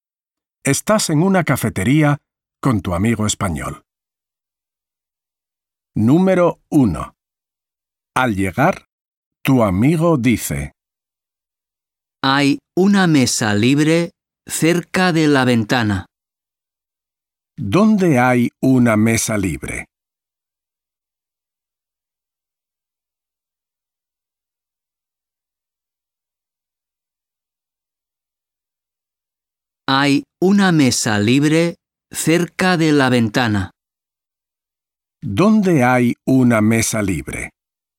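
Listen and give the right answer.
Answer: cerca de la ventana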